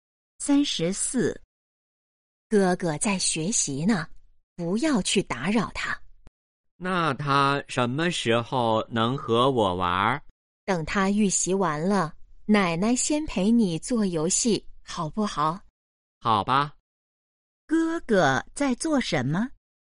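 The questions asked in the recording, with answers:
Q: 哥哥在做什么?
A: 预习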